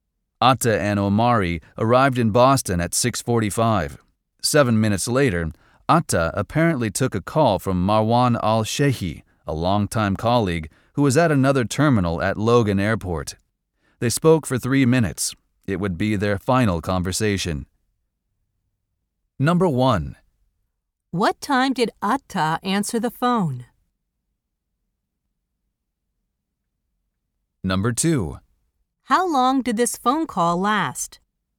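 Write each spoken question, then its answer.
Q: What time did Atta answer the phone?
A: 6:52

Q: How long did this phone call last?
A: 3 minutes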